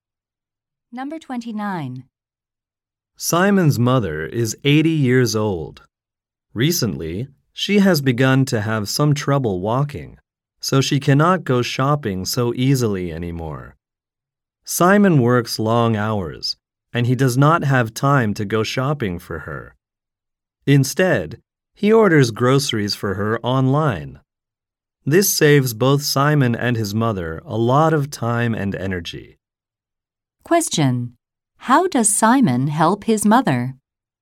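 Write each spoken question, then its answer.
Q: How does Simon help his mother?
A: He orders groceries for her online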